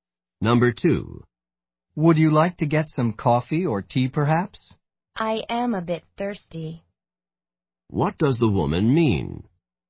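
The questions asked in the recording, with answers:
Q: What does the woman mean?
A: She would like something to drink.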